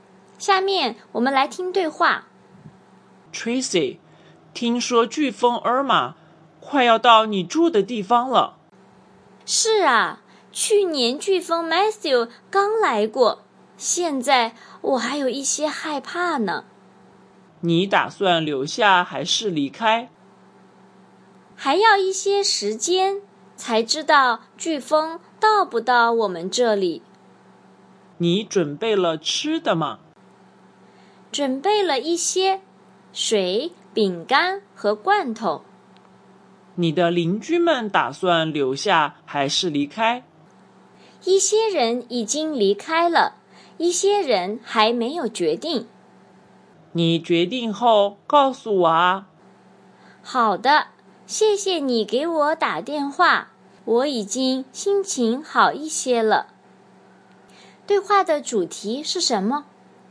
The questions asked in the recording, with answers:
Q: 对话的主题是什么?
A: 飓风来了。Hurricane is coming.